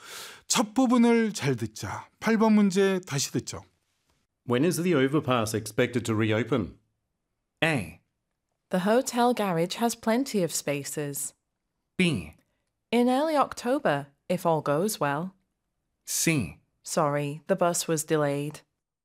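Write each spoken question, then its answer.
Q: When is the overpass expected to reopen?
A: B: In early October, if all goes well.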